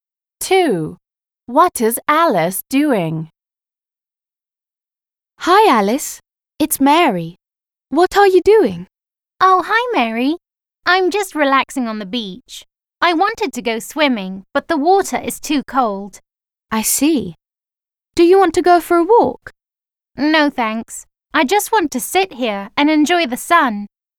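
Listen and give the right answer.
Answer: Relaxing on the beach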